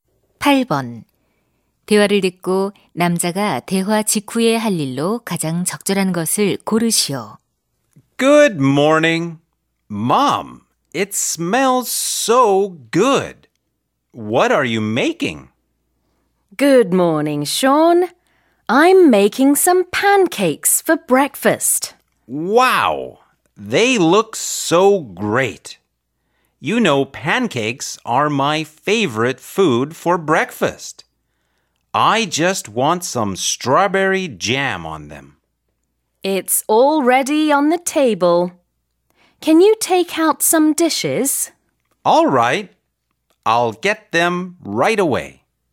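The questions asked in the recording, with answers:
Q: 대화를 듣고 남자가 대화 직후에 할 일로 가장 적절한 것을 고르시오.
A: 접시 꺼내기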